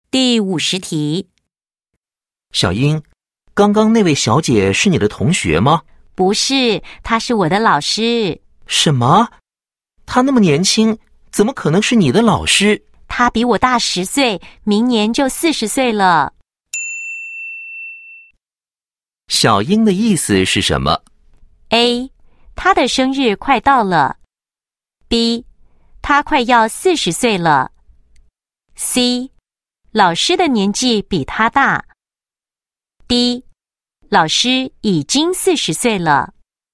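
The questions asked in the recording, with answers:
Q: 小英的意思是什么?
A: C:老师的年纪比他大。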